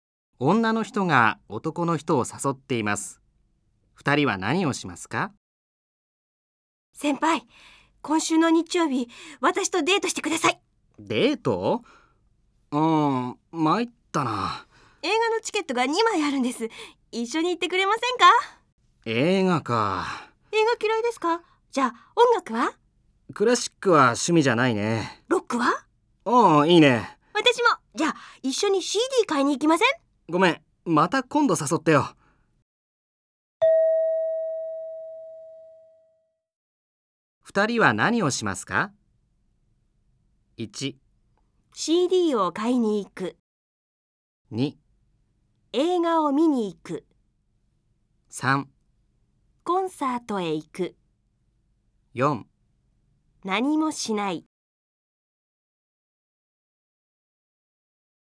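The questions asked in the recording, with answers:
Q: 二人は何をしますか?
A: 4: 何もしない。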